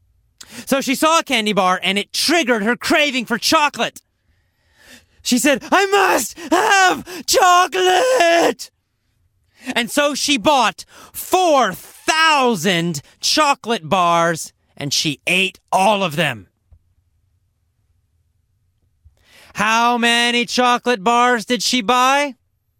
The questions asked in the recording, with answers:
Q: How many chocolate bars did she buy?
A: 4,000. She bought 4,000 chocolate bars.